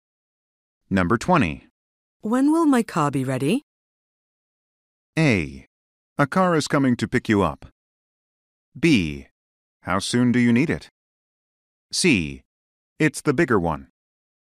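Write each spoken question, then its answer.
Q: When will my car be ready?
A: B: How soon do you need it?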